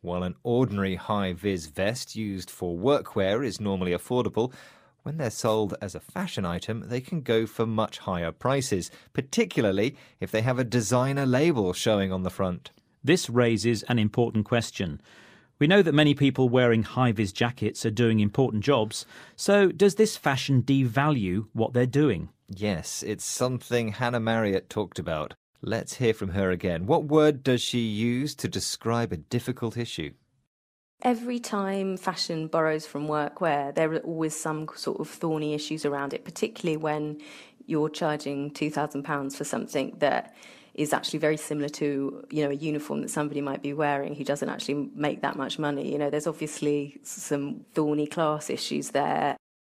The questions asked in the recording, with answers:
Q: What word does she use to describe a difficult issue?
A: So she used the word thorny to describe the issue of things worn at work becoming expensive fashion items.